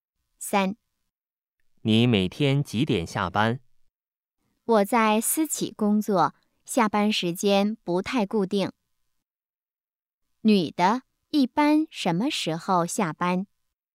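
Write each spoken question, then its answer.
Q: 女的,一般什么时候下班?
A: 时间不太固定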